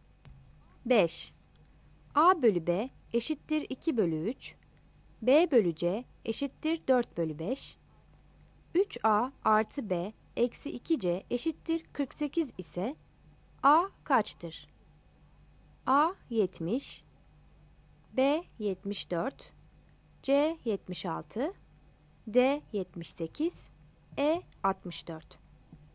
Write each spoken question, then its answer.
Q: A bölü B eşittir 2 bölü 3, B bölü C eşittir 4 bölü 5, 3A artı B eksi 2C eşittir 48 ise A kaçtır?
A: Yanıt E'dir.